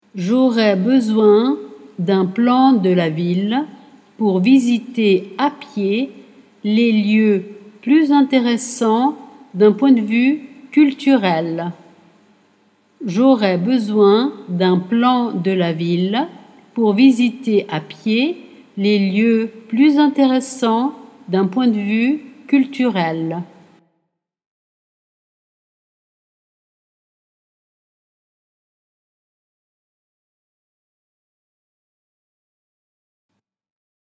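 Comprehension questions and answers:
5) J' pour plus intéressants d'un .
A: aurais besoin d'un plan de la ville / visiter à pied les lieux / point de vue culturel

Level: Dettato di francese A2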